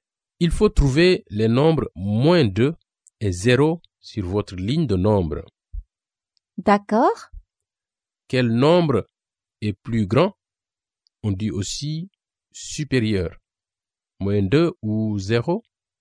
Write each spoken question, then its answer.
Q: Quel nombre est plus grand?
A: Donc, la réponse est 0.